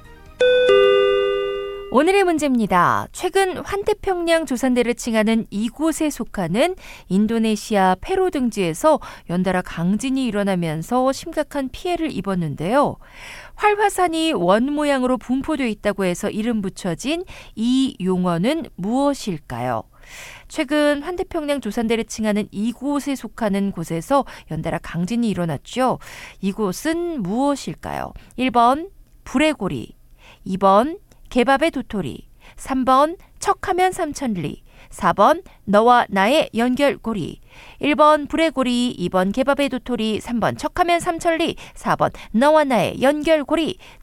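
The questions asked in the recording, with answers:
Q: 이곳은 무엇일까요?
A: 1: 불의 고리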